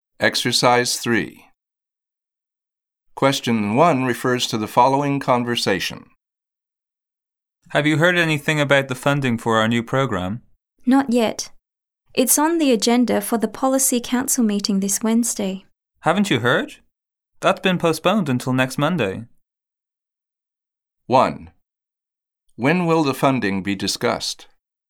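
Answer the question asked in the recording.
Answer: Next Monday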